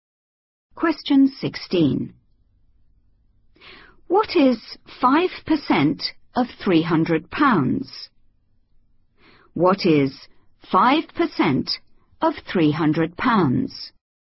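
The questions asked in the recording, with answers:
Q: What is 5% of £300?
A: £15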